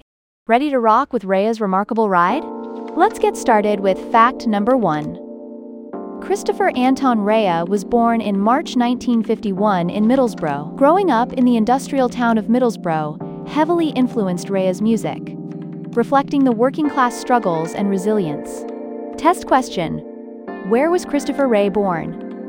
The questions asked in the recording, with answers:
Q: where was Christopher Rea born?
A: Middlesbrough.